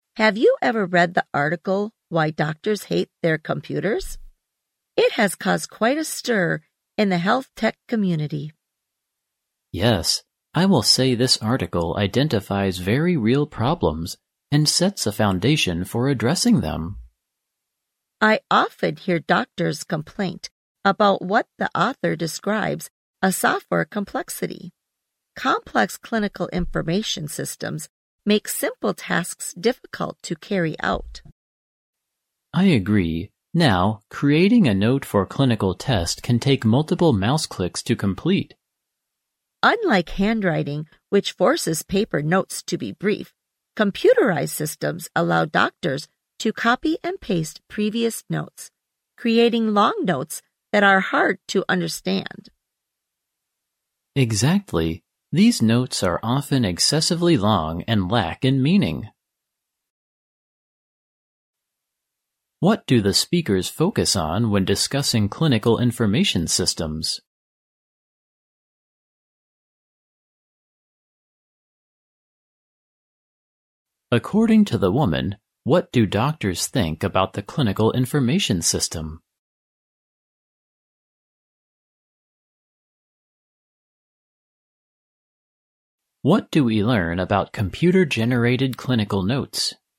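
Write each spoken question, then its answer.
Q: What do we learn about computer-generated clinical notes?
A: They are often excessively long and hard to understand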